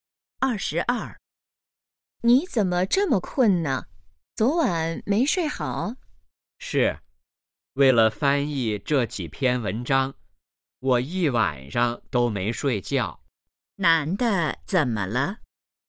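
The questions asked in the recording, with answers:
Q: 男的怎么了?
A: 一晚上没睡觉,很困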